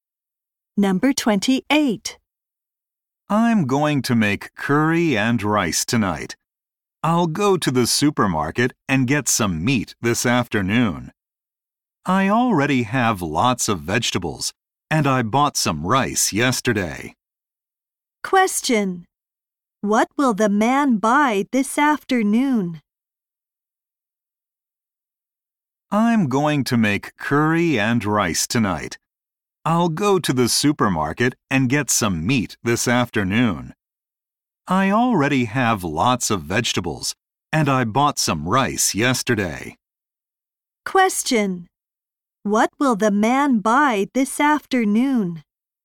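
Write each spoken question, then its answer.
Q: What will the man buy this afternoon?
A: Some meat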